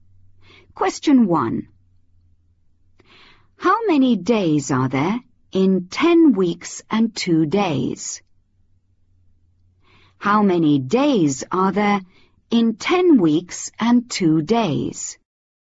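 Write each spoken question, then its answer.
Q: How many days are there in 10 weeks and 2 days?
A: 72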